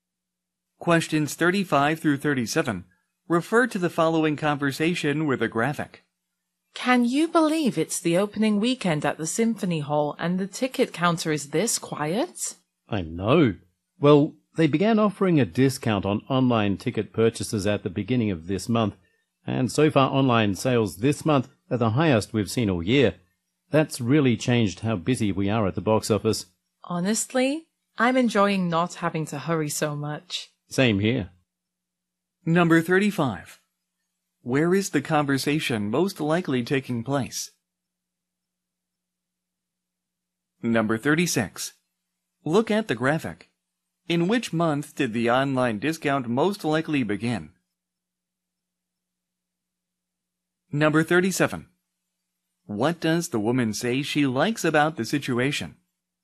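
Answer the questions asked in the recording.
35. At a concert hall box office
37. Not having to hurry so much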